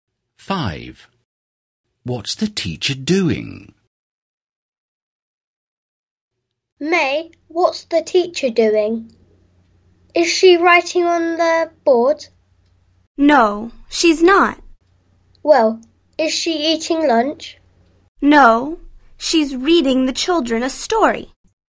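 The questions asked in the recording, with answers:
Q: What's the teacher doing?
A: Reading the children a story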